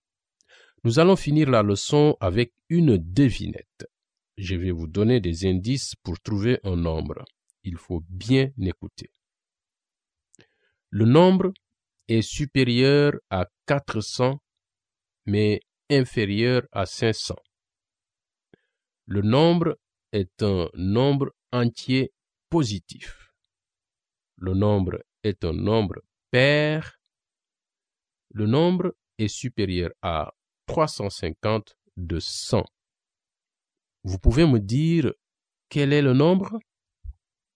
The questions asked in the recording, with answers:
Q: Vous pouvez me dire quel est le nombre?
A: 450?